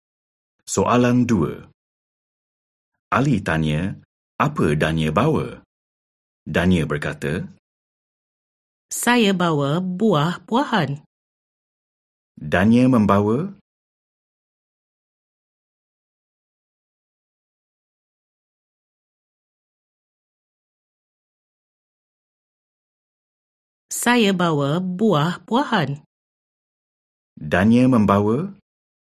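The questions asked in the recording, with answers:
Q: Dania membawa?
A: Buah-buahan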